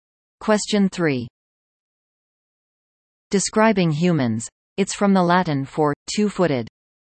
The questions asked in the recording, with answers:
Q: Describing humans, it's from the Latin for two-footed.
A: Bipedal.